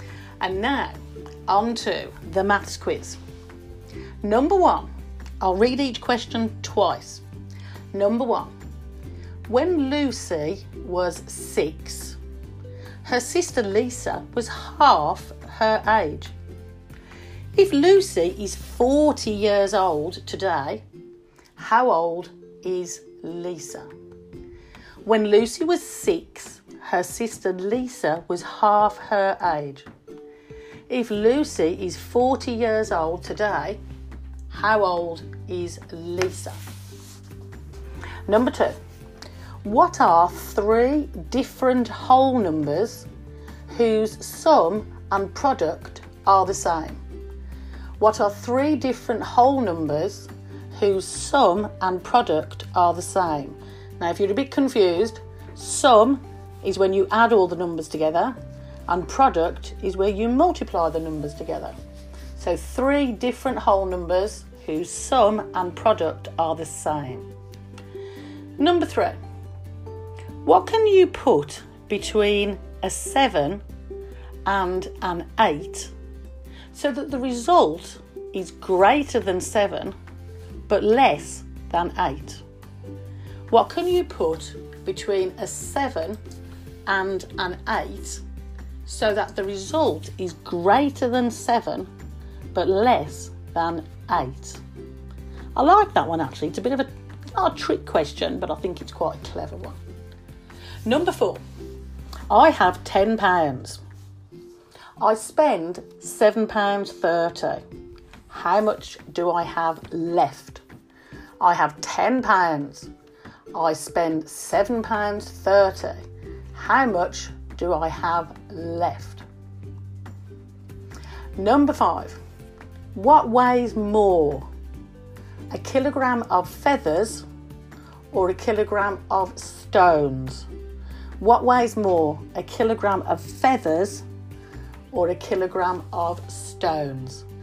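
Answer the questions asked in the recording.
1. 37
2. 1, 2 and 3
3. a decimal point (7.8)
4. £2.70
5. Neither; they weigh the same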